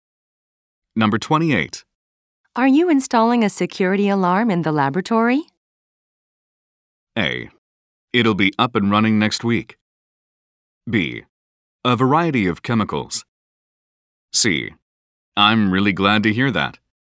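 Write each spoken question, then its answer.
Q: Are you installing a security alarm in the laboratory?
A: A: It'll be up and running next week.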